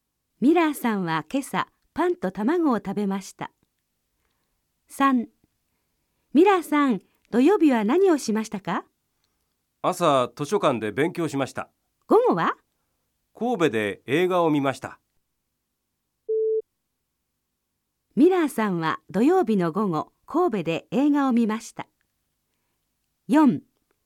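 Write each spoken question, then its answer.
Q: ミラーさんは土曜日の午後、神戸で映画を見ました。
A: ○(正しい)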